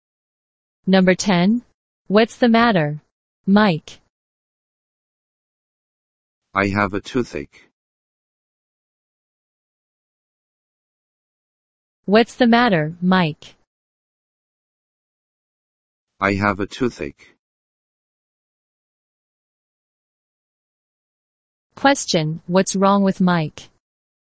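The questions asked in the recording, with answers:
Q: Question, what's wrong with Mike?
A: He has a toothache.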